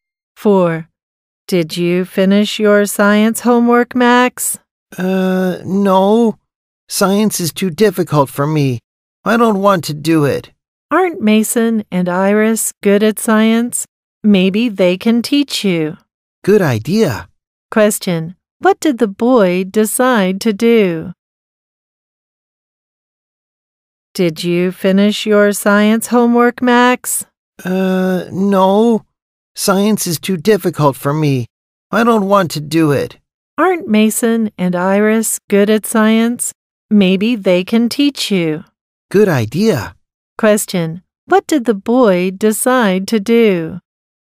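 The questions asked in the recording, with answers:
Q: What did the boy decide to do?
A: Ask Mason and Iris to help him with his science homework.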